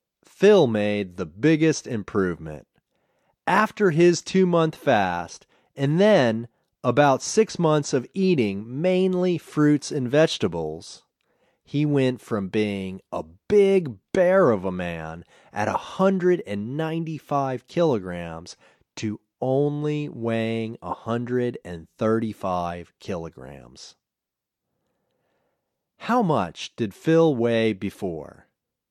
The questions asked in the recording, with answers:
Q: How much did Phil weigh before?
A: Before, Phil weighed 195 kilograms.